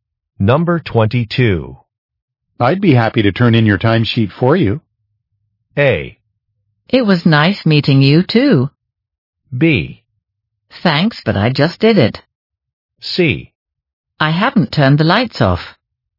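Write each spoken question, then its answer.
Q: I'd be happy to turn in your timesheet for you.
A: B: Thanks, but I just did it.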